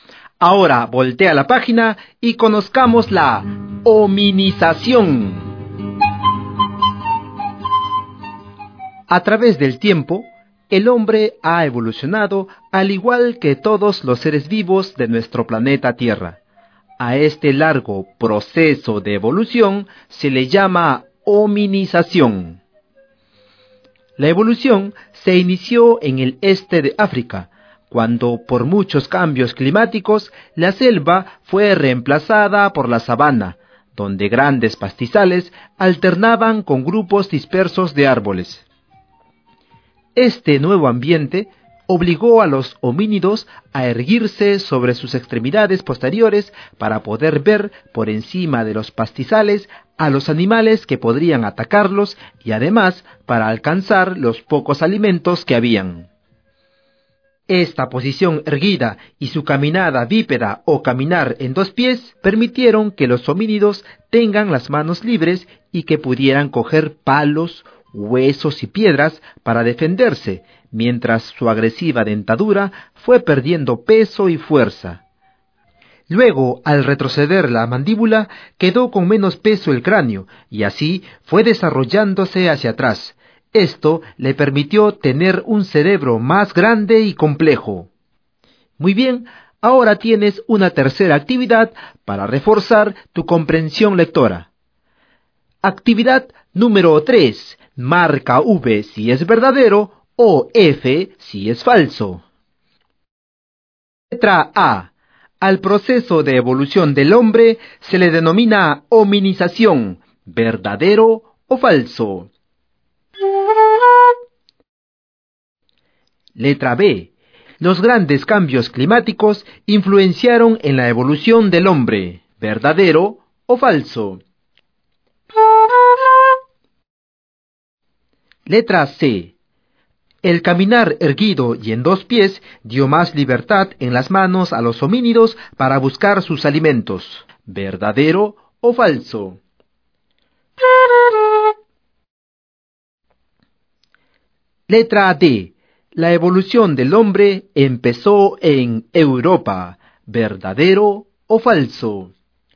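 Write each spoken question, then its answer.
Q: Letra A. Al proceso de evolución del hombre se le denomina hominización, verdadero o falso.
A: Verdadero

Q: Letra B. Los grandes cambios climáticos influenciaron en la evolución del hombre, verdadero o falso.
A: Verdadero

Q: Letra C. El caminar erguido y en dos pies dio más libertad en las manos a los homínidos para buscar sus alimentos, verdadero o falso.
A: Verdadero

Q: Letra D. La evolución del hombre empezó en Europa, verdadero o falso.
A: Falso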